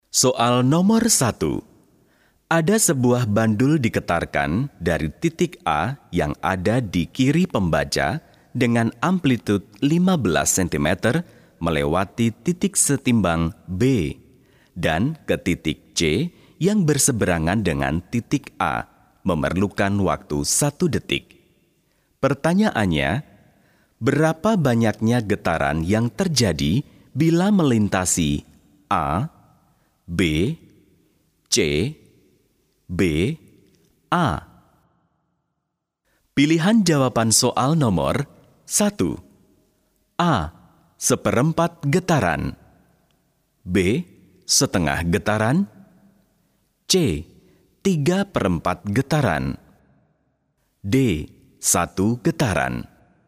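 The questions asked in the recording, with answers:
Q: Pertanyaannya, berapa banyaknya getaran yang terjadi bila melintasi A, B, C, B, A?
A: D: 1 getaran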